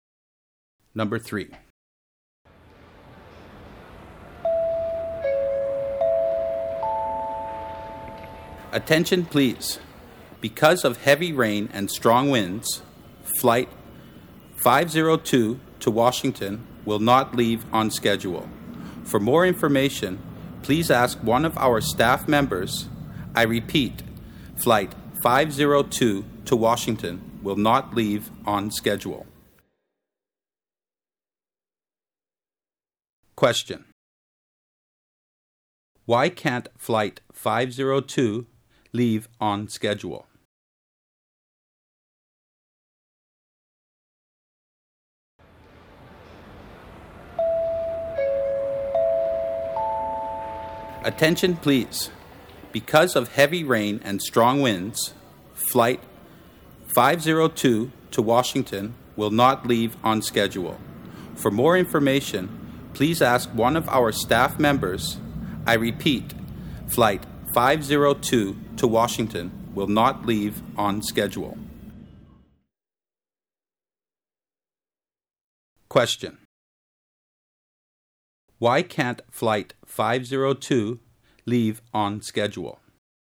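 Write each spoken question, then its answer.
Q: Why can't flight 502 leave on schedule?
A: Because of heavy rain and strong winds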